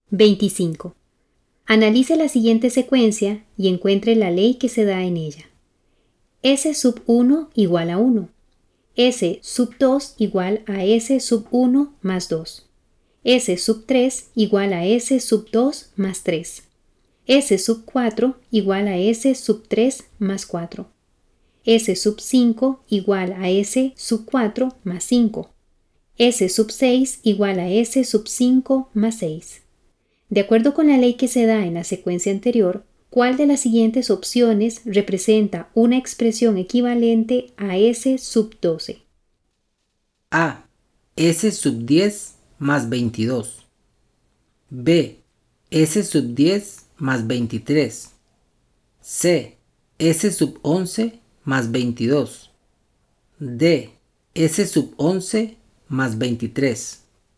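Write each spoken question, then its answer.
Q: De acuerdo con la ley que se da en la secuencia anterior, ¿cuál de las siguientes opciones representa una expresión equivalente a S sub 12?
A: B: S sub 10 más 23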